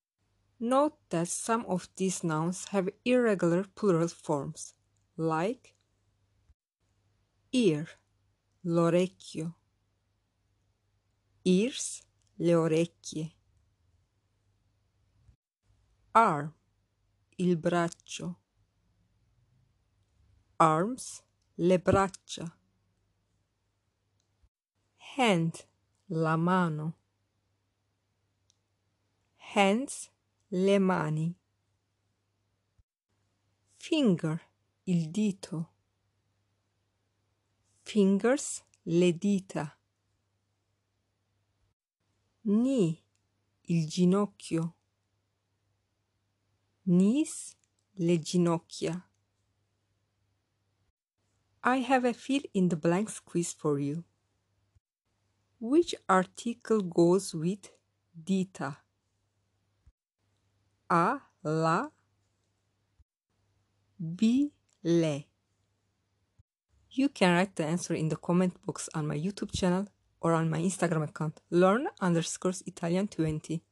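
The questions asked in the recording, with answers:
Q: Which article goes with dita?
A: B: le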